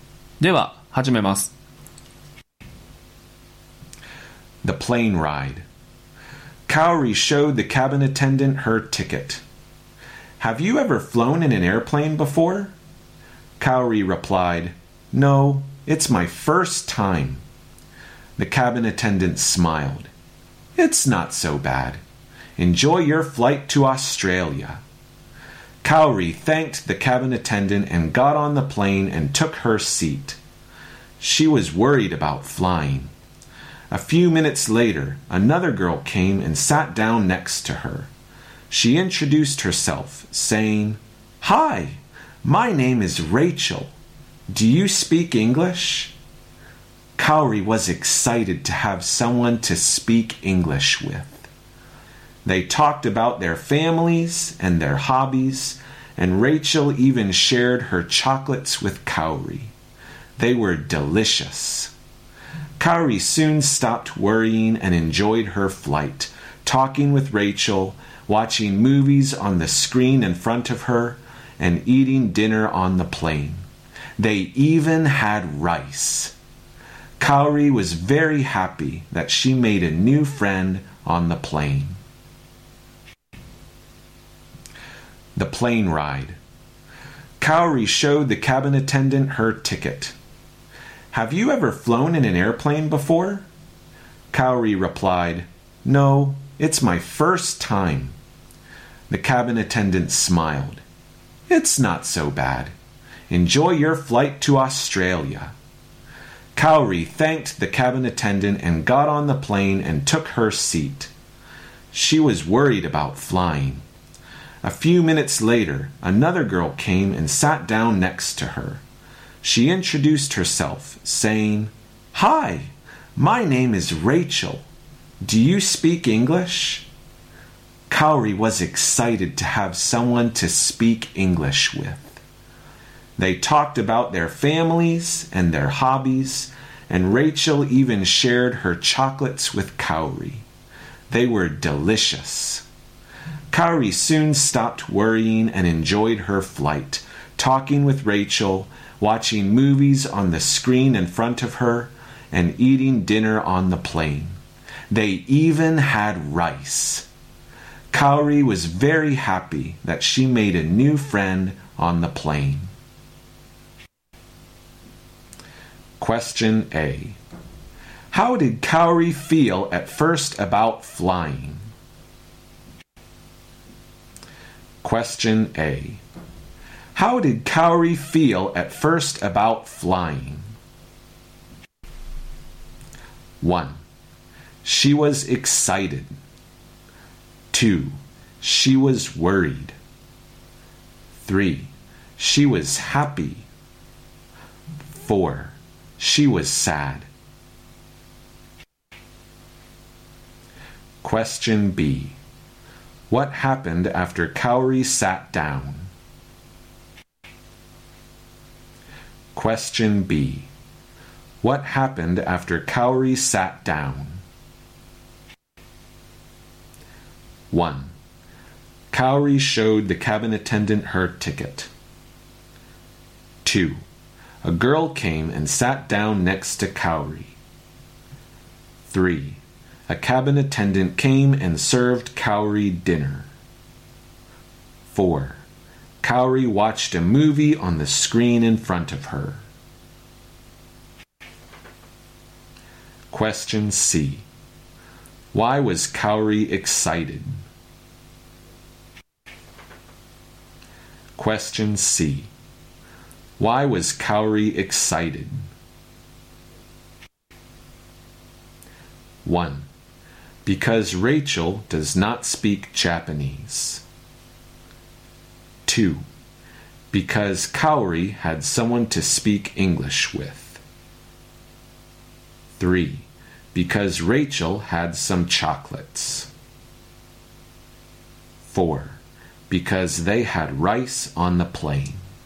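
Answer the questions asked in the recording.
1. 2: She was worried.
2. 2: A girl came and sat down next to Kaori.
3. 2: Because Kaori had someone to speak English with.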